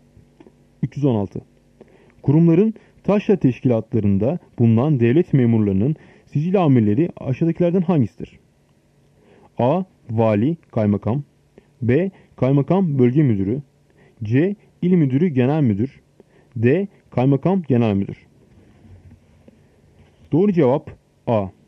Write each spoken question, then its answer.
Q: Kurumların taşra teşkilatlarında bulunan devlet memurlarının sicil amirleri aşağıdakilerden hangisidir?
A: Doğru cevap A. Vali, Kaymakam.